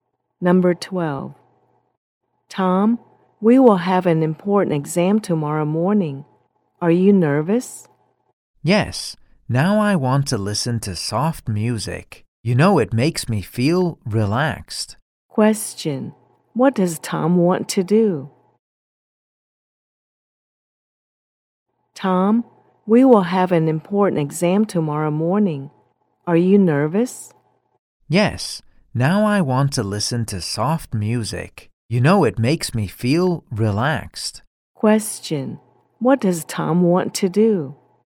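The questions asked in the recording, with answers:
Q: What does Tom want to do?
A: Listen to soft music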